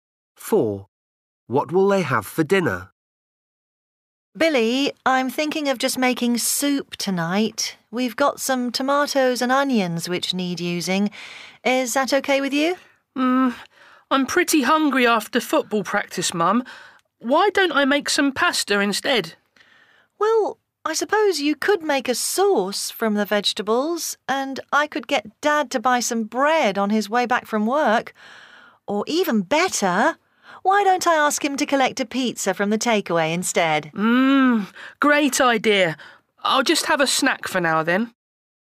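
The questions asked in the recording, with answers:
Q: What will they have for dinner?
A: takeaway pizza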